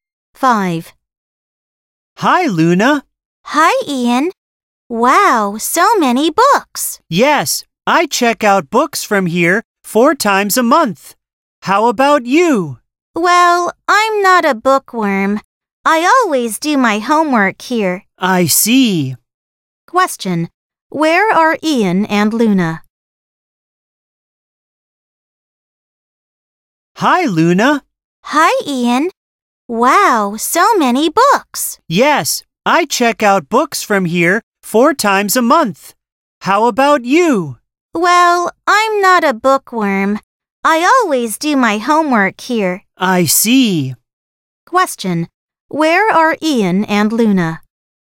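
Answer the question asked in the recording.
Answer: In the library.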